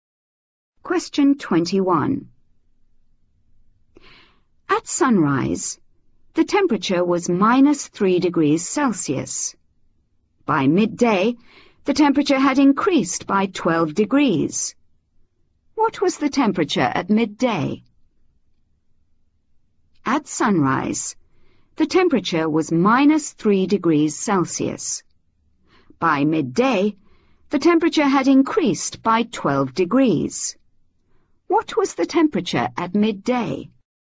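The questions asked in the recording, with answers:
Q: What was the temperature at midday?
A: 9 degrees Celsius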